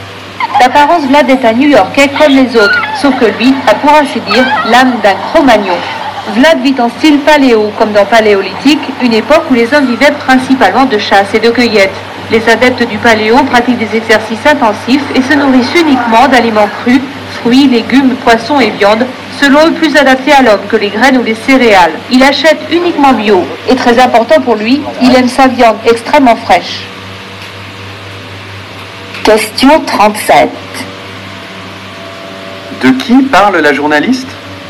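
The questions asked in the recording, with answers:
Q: De qui parle la journaliste ?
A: De Vlad, un New-Yorkais qui vit en style paléo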